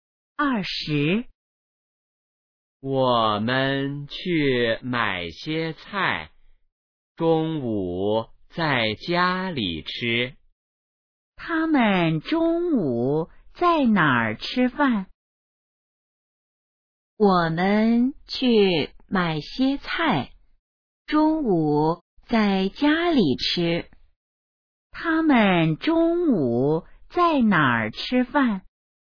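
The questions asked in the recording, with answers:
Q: 他们中午在哪儿吃饭?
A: 在家里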